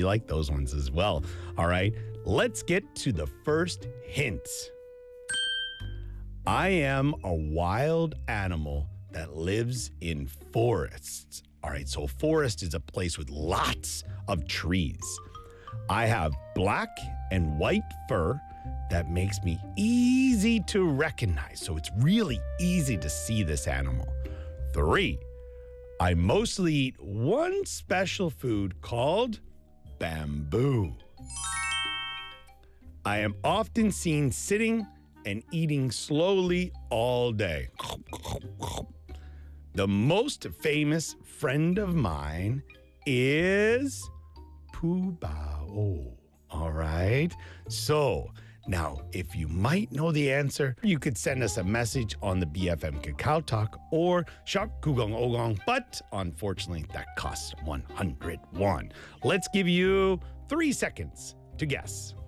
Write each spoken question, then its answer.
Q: Let's give you 3 seconds to guess.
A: If you said panda, you would be correct.